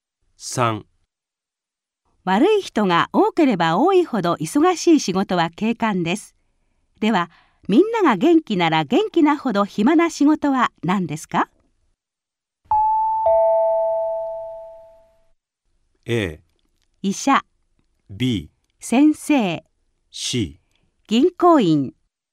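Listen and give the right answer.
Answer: A: 医者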